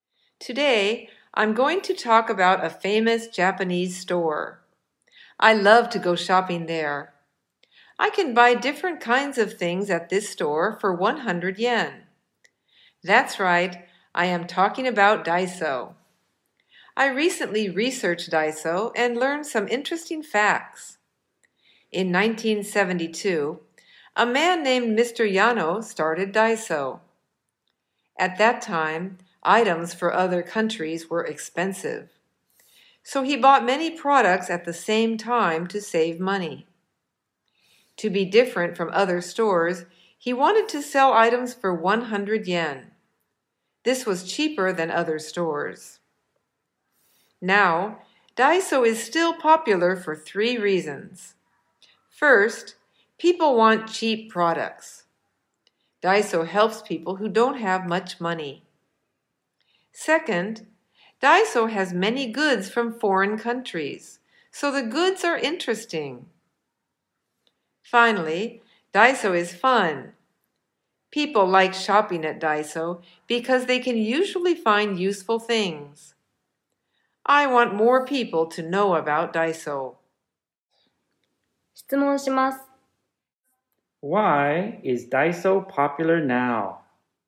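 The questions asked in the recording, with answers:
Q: Why is Daiso popular now?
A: Because people want cheap products, it has interesting goods from foreign countries, and it is fun.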